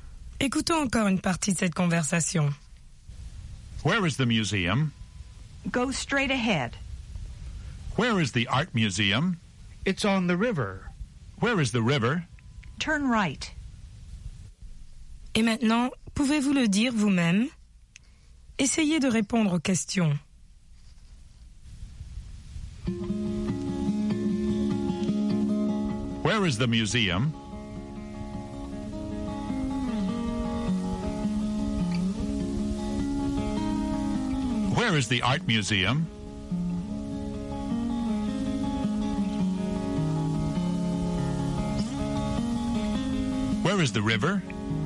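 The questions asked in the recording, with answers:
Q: Where is the museum?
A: Go straight ahead.

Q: Where is the art museum?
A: It's on the river.

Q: Where is the river?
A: Turn right.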